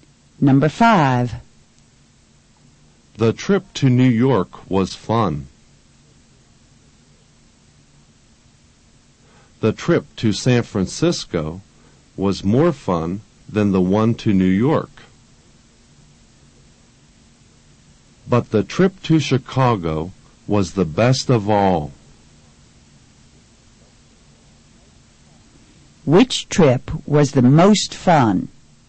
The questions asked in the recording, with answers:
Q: Which trip was the most fun?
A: the trip to Chicago was the most fun.